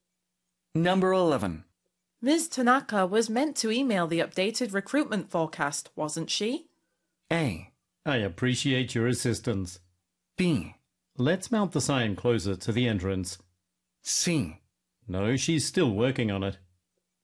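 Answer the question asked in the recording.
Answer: C: No, she's still working on it.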